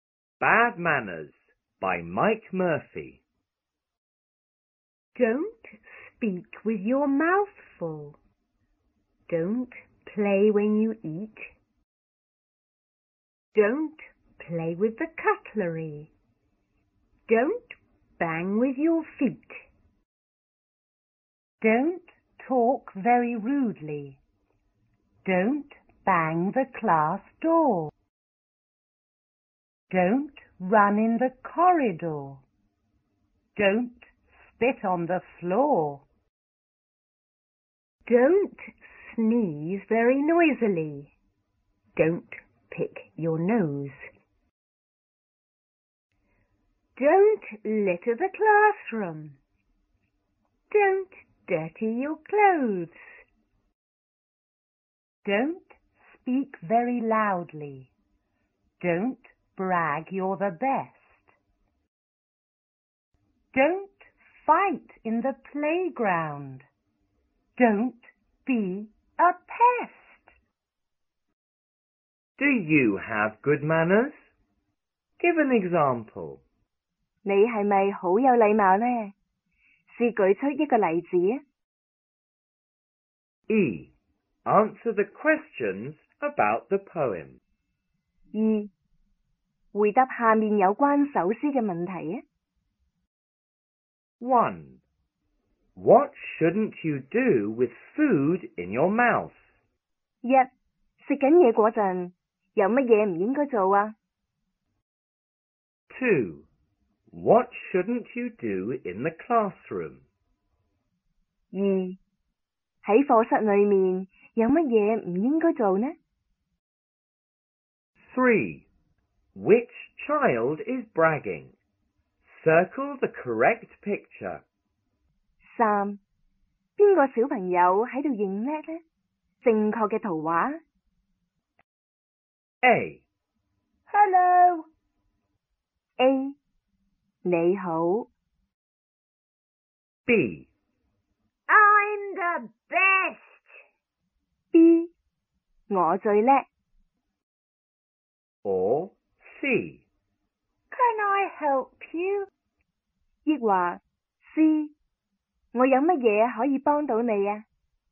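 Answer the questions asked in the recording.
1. Speak (don't speak with your mouth full)
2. Litter the classroom
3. B: I'm the best.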